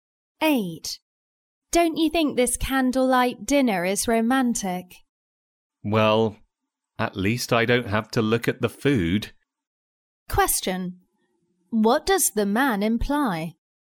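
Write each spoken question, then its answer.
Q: What does the man imply?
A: The food doesn't look good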